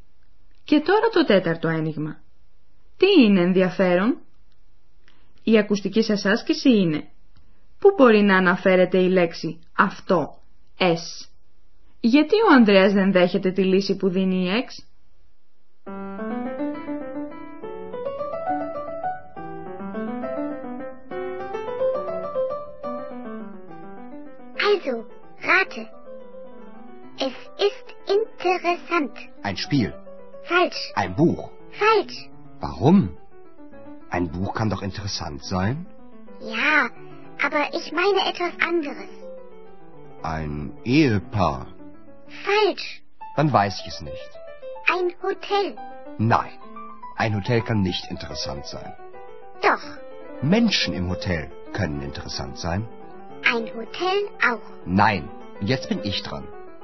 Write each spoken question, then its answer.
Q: Γιατί ο Ανδρέας δεν δέχεται τη λύση που δίνει η Ex?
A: Άνθρωποι στο ξενοδοχείο μπορεί να είναι ενδιαφέροντες.